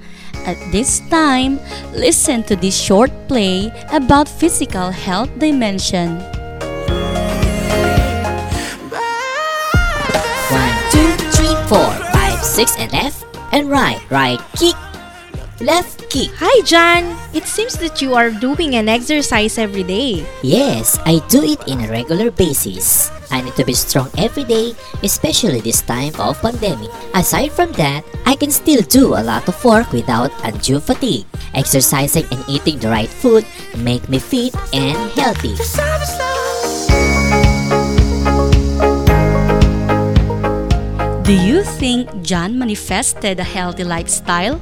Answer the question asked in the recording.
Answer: John manifested a healthy lifestyle by eating healthy foods and exercising.